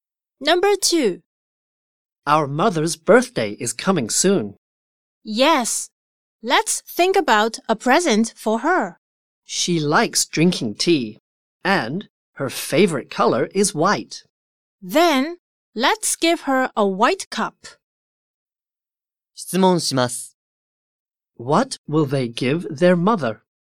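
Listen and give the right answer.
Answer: A white cup.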